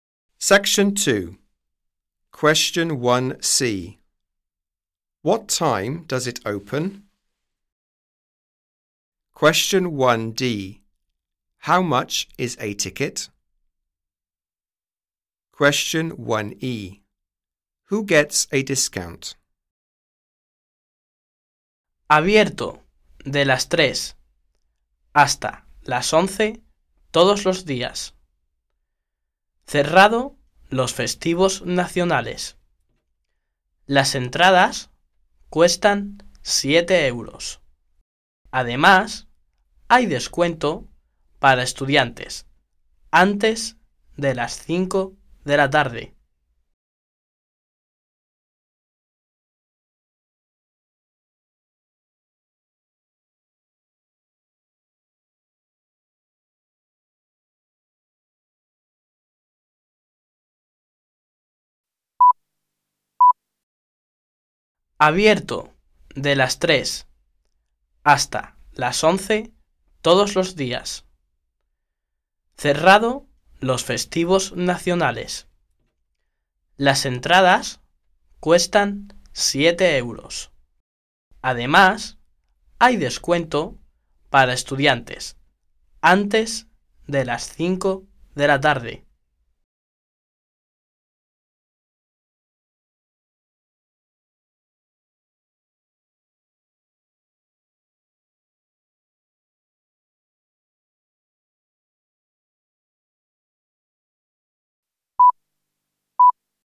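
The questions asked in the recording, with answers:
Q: What time does it open?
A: 3 o'clock

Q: How much is a ticket?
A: 7 euros

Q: Who gets a discount?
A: Students (before 5 pm)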